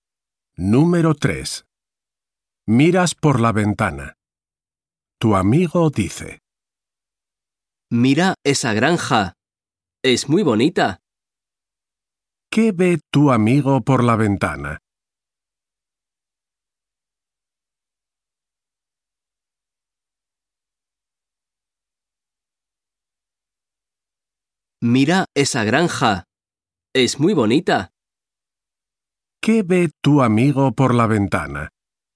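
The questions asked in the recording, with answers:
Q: ¿Qué ve tu amigo por la ventana?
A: Una granja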